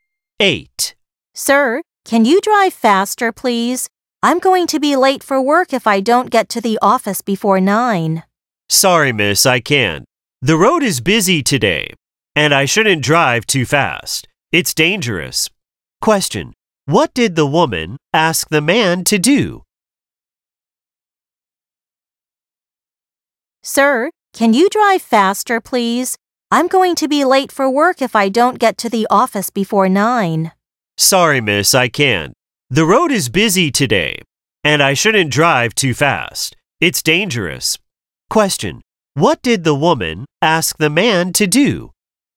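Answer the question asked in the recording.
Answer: Drive faster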